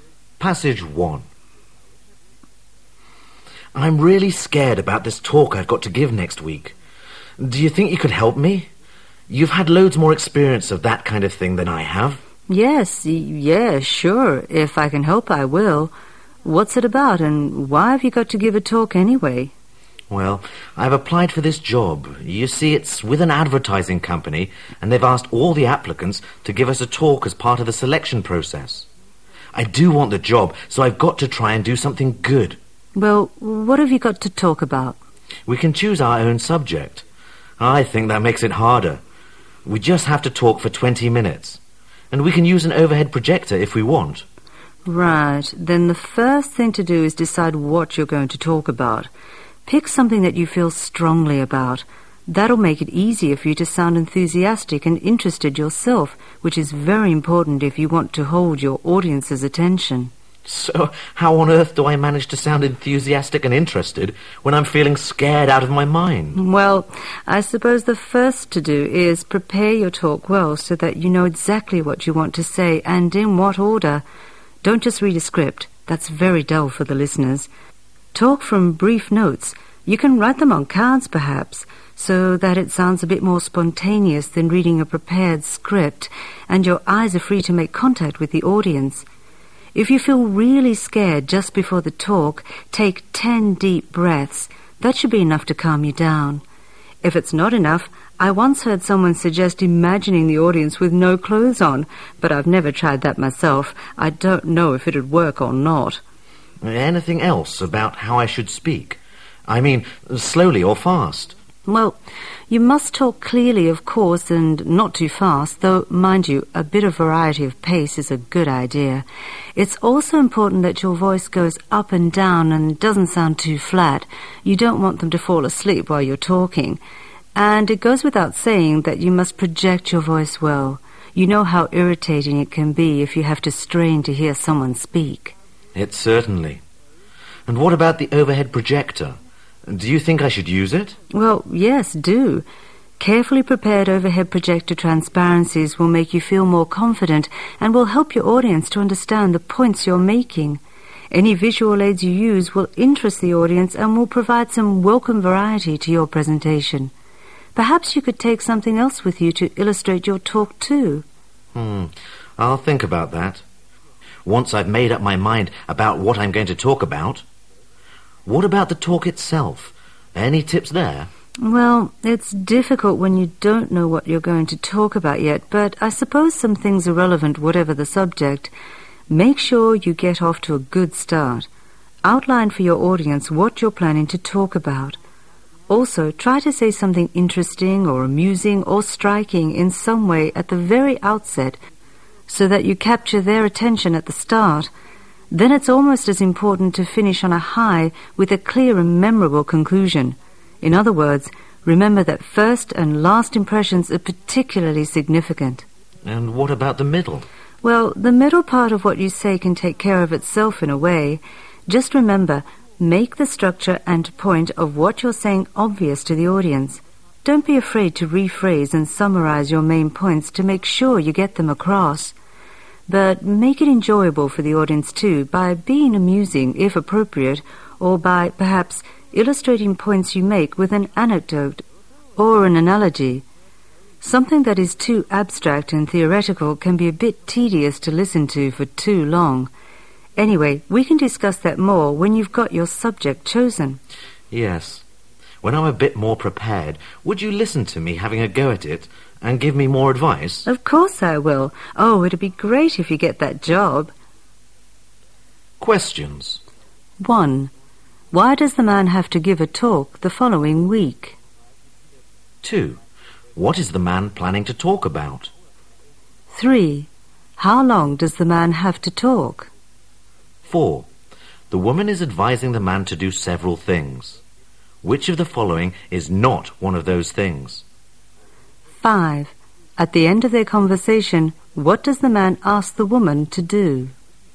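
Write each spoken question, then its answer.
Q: Why does the man have to give a talk the following week?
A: As part of the selection process for a job he applied for

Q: What is the man planning to talk about?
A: He hasn't decided yet

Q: How long does the man have to talk?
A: 20 minutes

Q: At the end of their conversation, what does the man ask the woman to do?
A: Listen to him practise the talk and give more advice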